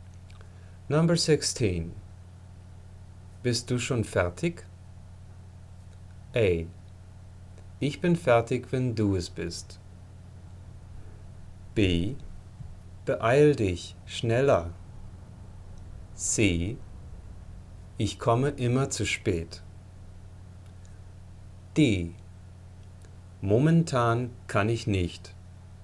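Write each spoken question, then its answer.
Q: Bist du schon fertig?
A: A: Ich bin fertig, wenn du es bist.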